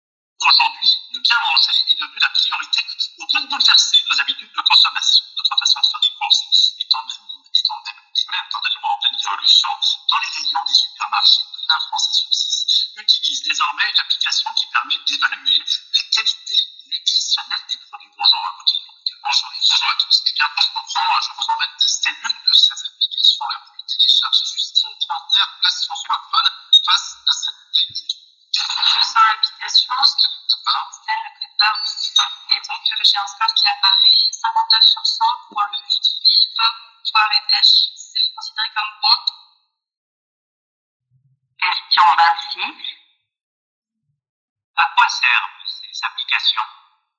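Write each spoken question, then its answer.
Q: À quoi servent ces applications ?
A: À évaluer la qualité nutritionnelle des produits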